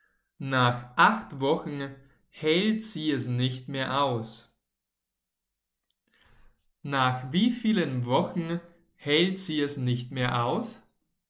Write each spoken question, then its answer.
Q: Nach wie vielen Wochen hält sie es nicht mehr aus?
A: nach acht Wochen. Sie hält es nach acht Wochen